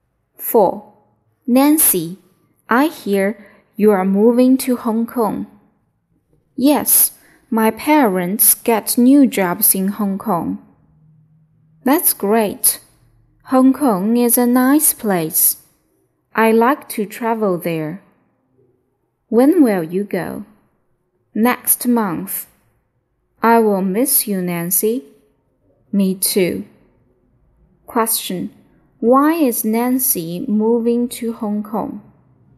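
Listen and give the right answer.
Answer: Her parents got new jobs in Hong Kong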